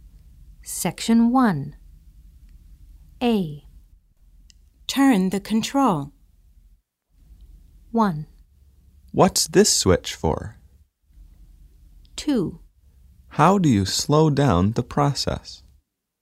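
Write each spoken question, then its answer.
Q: Turn the control.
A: 2: How do you slow down the process?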